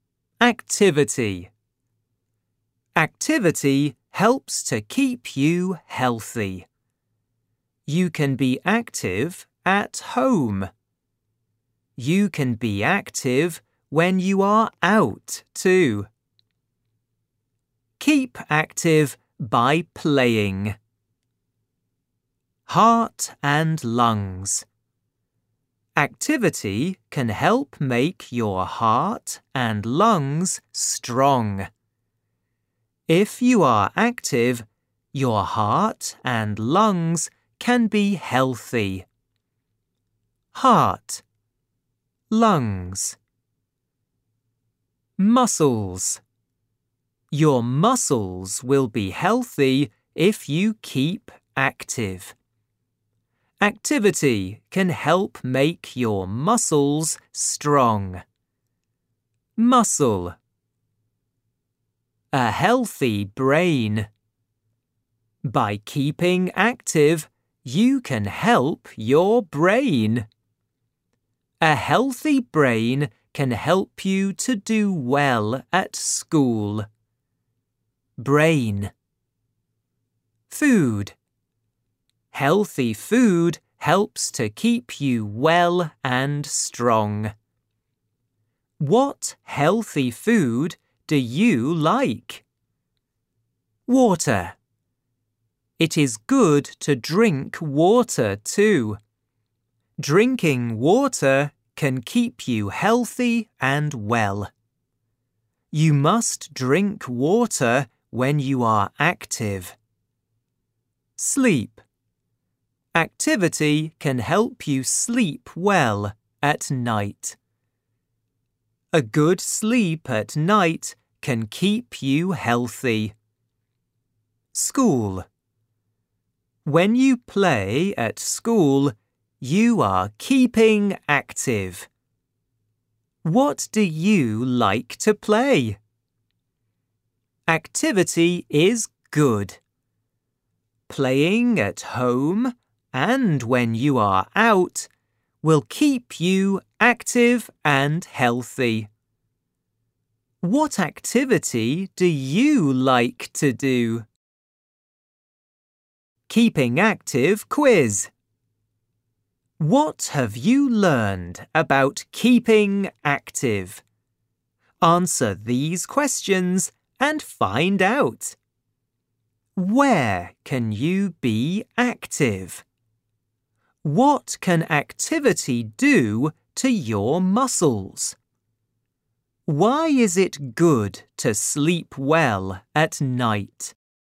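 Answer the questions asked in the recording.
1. At home and when you are out
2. Make them strong
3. It keeps you healthy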